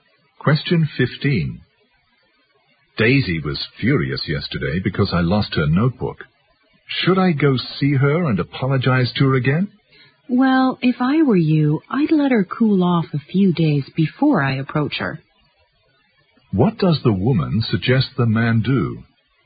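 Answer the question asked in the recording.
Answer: Wait a few days for Daisy to calm down before approaching her.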